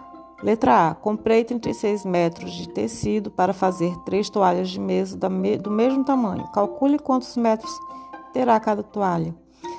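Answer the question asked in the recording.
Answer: 12 metros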